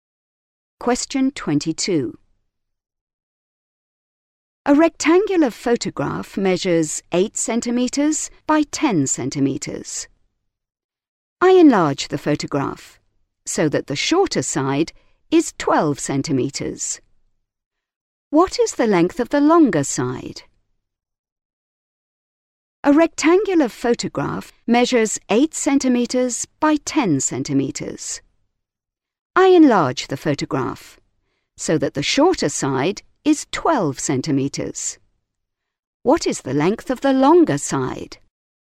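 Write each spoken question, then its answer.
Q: What is the length of the longer side?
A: 15 centimetres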